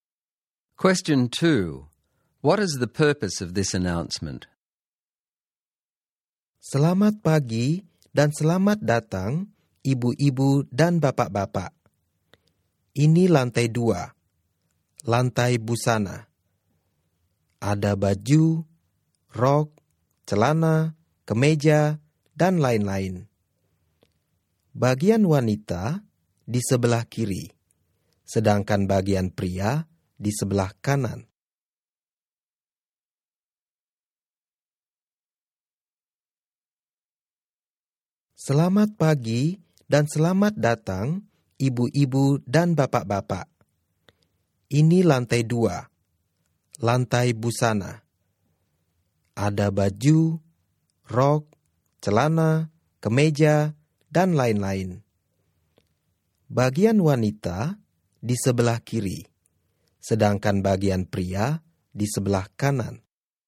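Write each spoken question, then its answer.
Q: What is the purpose of this announcement?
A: To welcome shoppers and tell them what is on the 2nd (clothing) floor: women's section on the left, men's on the right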